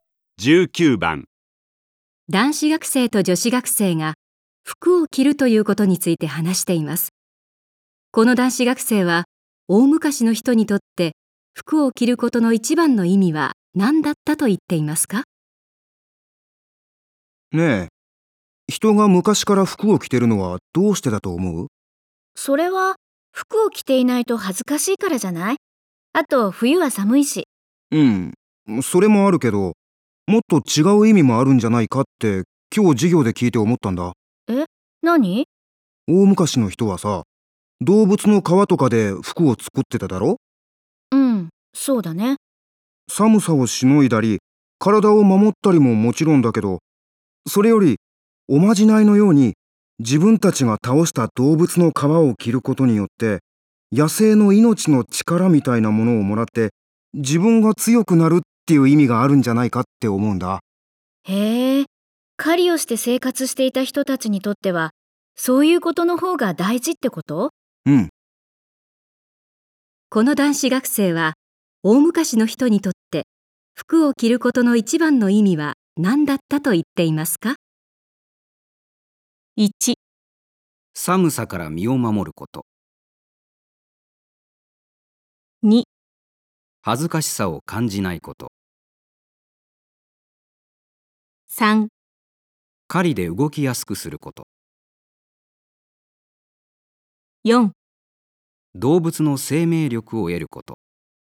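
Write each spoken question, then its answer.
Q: この男子学生は大昔の人にとって服を着ることの一番の意味は何だったと言っていますか?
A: 4: 動物の生命力を得ること。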